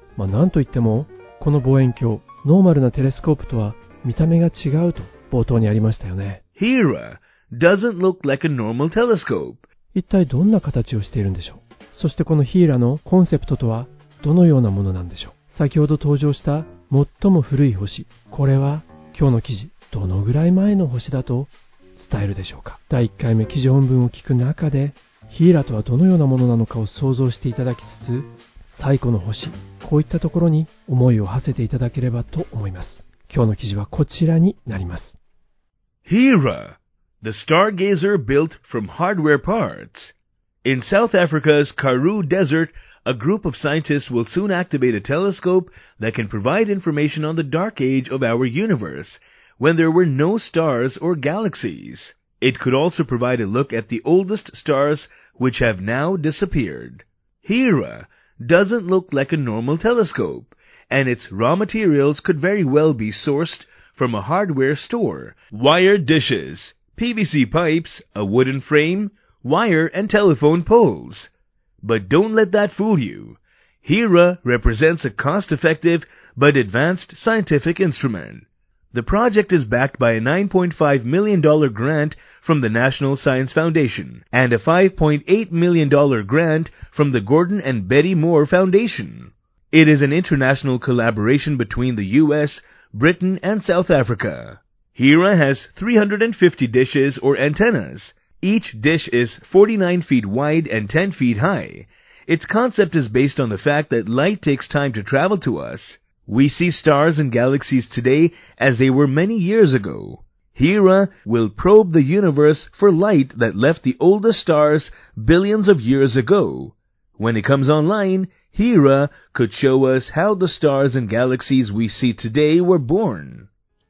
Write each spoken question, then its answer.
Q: そしてこの HERA のコンセプトとはどのようなものなんでしょう?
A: Its concept is based on the fact that light takes time to travel to us.

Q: 先ほど登場した最も古い星、これは今日の記事、どのぐらい前の星だと伝えるでしょうか。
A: その光というのは数十億年前に最も古い星から発せられた光。